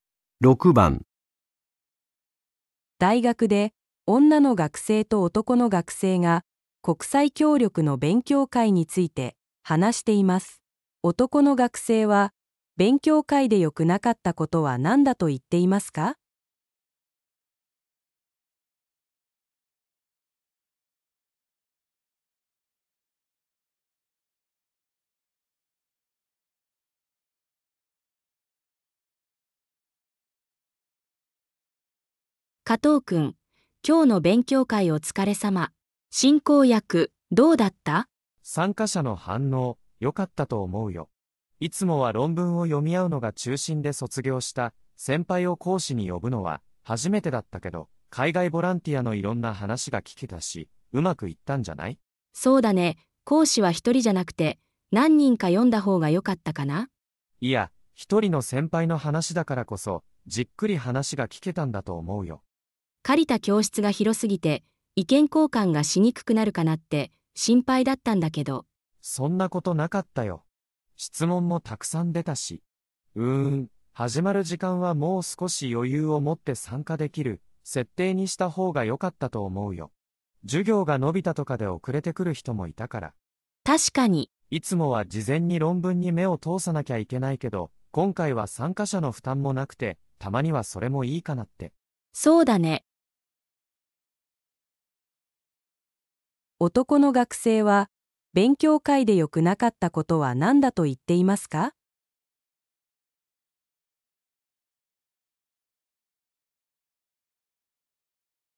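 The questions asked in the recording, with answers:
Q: 男の学生は、勉強会で良くなかったことは何だと言っていますか?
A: 始まる時間に余裕がなく、遅れて来る人がいたこと

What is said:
大学で女の学生と男の学生が国際協力の勉強会について話しています。男の学生は勉強会で良くなかったことは何だと言っていますか。
女:加藤くん、今日の勉強会お疲れ様。進行役、どうだった?
男:参加者の反応、よかったと思うよ。いつもは論文を読み合うのが中心で卒業した先輩を講師に呼ぶのは初めてだったけど、海外ボランティアのいろんな話が聞けたし、うまくいったんじゃない?
女:そうだね。講師は一人じゃなくて何人か呼んだほうがよかったかな?
男:いや、一人の先輩の話だからこそ、じっくり話が聞けたんだと思うよ。
女:借りた教室が広すぎて意見交換がしにくくなるかなって心配だったんだけど。
男:そんなことなかったよ。質問もたくさん出たし。うーん、始まる時間はもう少し余裕を持って参加できる設定にしたほうがよかったと思うよ。授業が延びたとかで遅れてくる人もいたから。
女:確かに。
男:いつもは事前に論文に目を通さなきゃいけないけど、今回は参加者の負担もなくて、たまにはそれもいいかなって。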